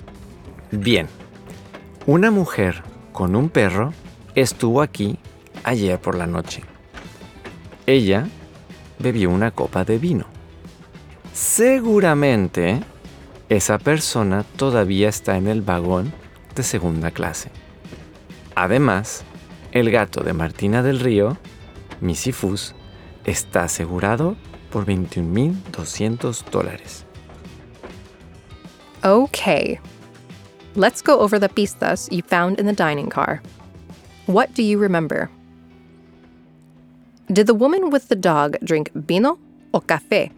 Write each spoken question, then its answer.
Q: Did the woman with the dog drink vino o café?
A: Right. She had vino.